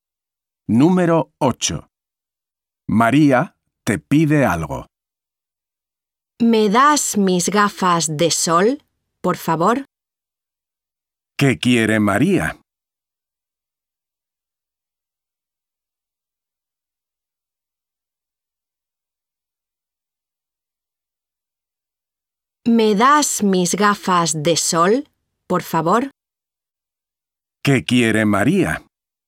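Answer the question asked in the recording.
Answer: Sus gafas de sol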